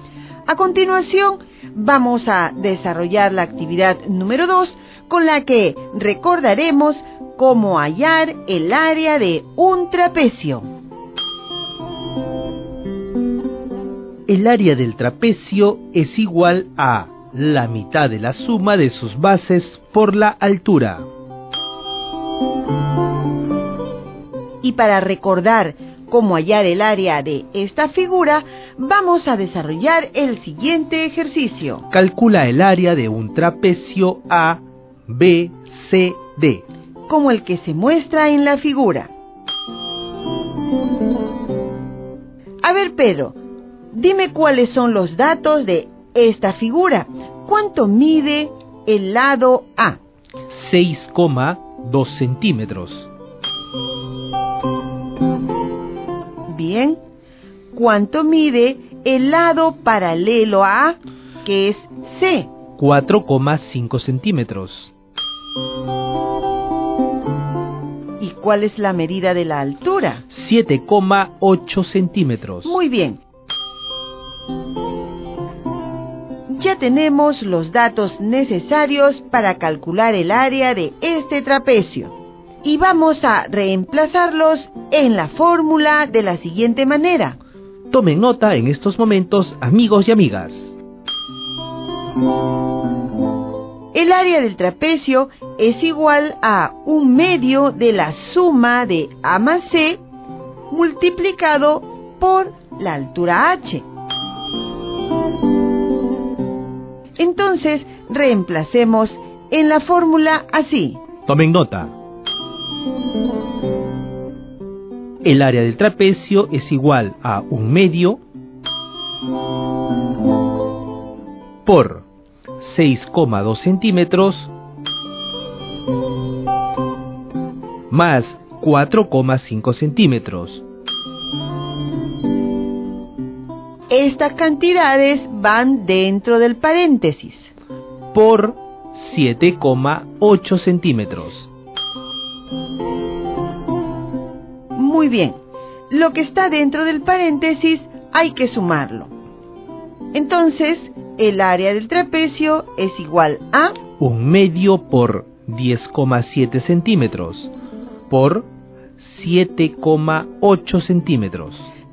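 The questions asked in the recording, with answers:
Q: Calcula el área de un trapecio A, B, C, D,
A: 41,73 cm2 (1/2 × 10,7 × 7,8)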